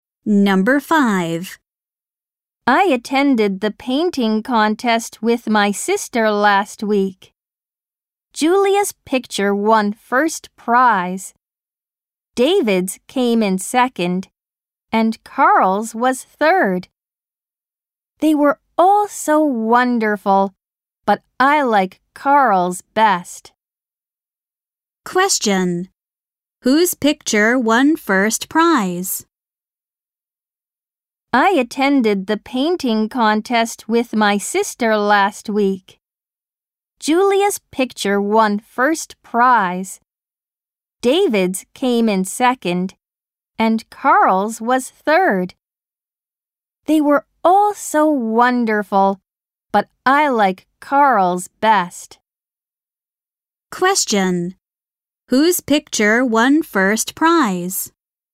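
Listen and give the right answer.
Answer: Julia's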